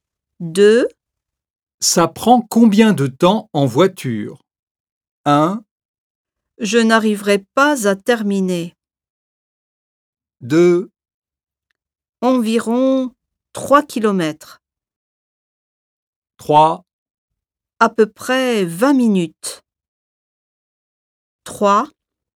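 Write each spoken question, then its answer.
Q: Ça prend combien de temps en voiture?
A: 3: À peu près 20 minutes.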